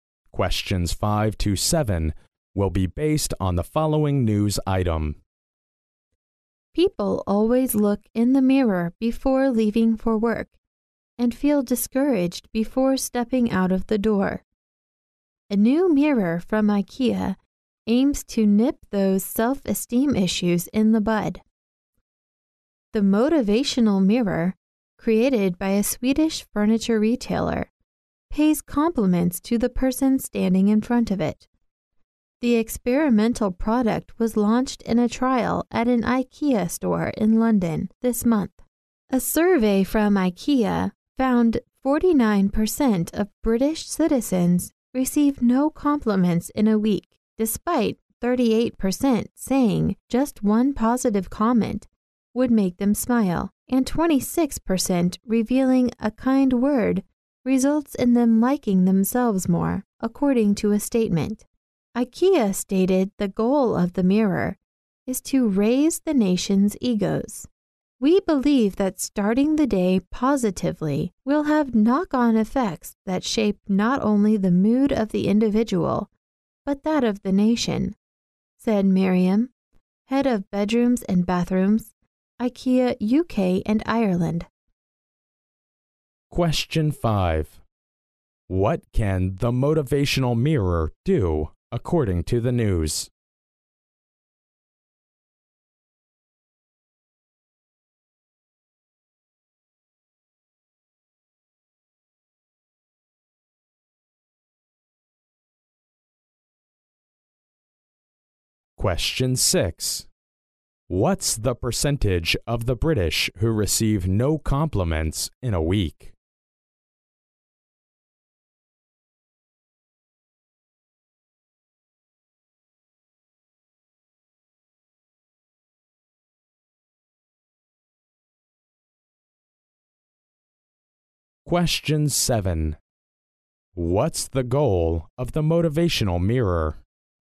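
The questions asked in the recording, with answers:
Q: What can the motivational mirror do, according to the news?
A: Pay compliments to the person standing in front of it

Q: What's the percentage of the British who receive no compliments in a week?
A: 49%

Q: What's the goal of the motivational mirror?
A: To raise the nation's egos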